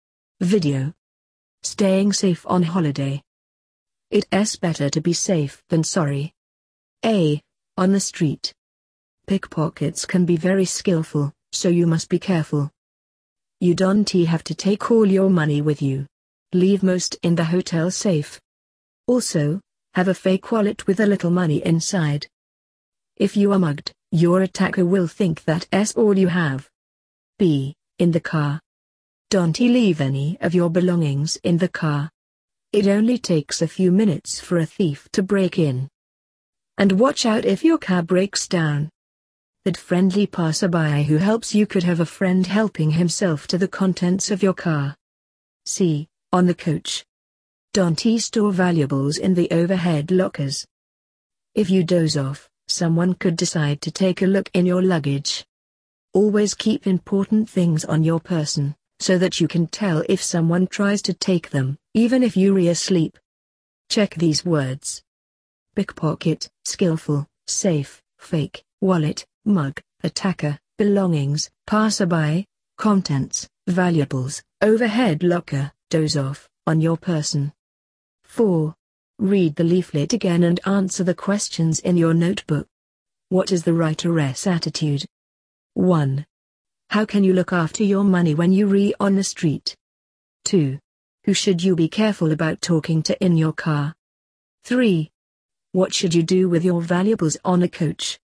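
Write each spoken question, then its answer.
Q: How can you look after your money when you're on the street?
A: Leave most of it in the hotel safe and carry a fake wallet with a little money in it.

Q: Who should you be careful about talking to in your car?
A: A friendly passerby who offers help when your car breaks down.

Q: What should you do with your valuables on a coach?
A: Keep them on your person, not in the overhead lockers.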